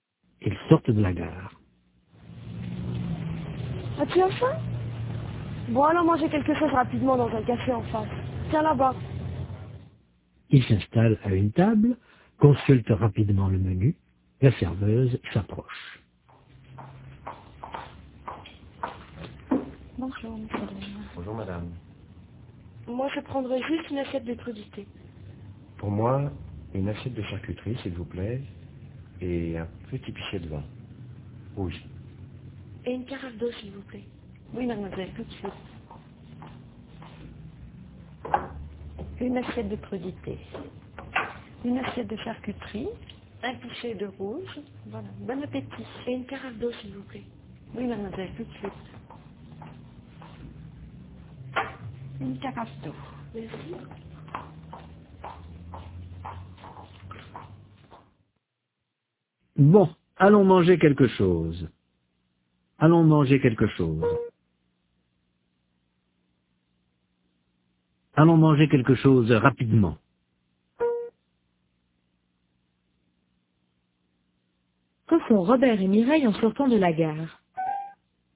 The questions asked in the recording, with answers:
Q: Que font Robert et Mireille en sortant de la gare ?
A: Ils vont manger quelque chose rapidement.